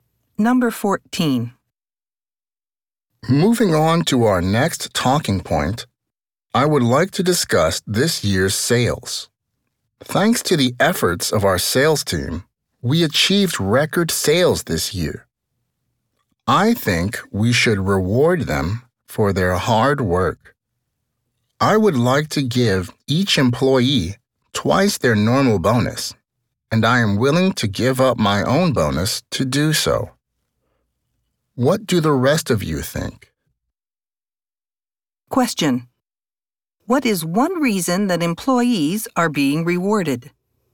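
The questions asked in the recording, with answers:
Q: What is one reason that employees are being rewarded?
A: They achieved record sales this year.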